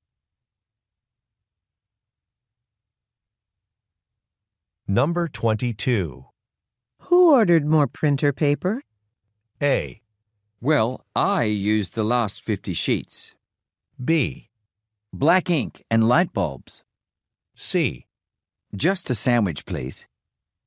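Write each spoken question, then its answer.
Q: Who ordered more printer paper?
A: A: Well, I used the last 50 sheets.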